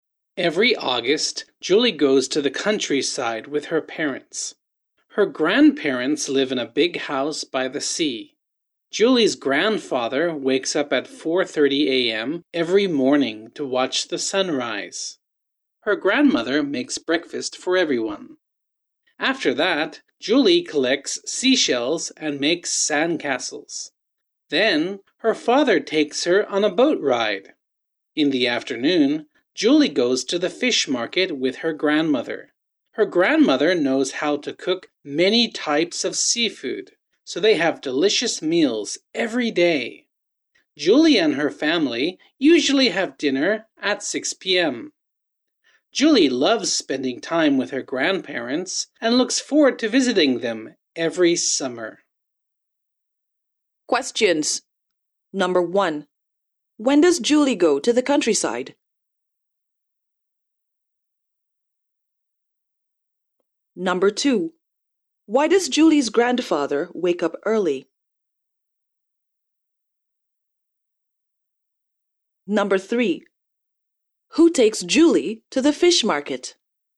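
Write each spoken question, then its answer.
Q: When does Julie go to the countryside?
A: Every August

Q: Why does Julie's grandfather wake up early?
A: To watch the sunrise

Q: Who takes Julie to the fish market?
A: Her grandmother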